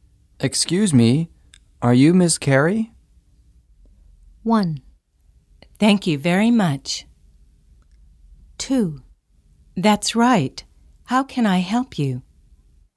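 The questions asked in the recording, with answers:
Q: Excuse me, are you Miss Carey?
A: 2: That's right. How can I help you?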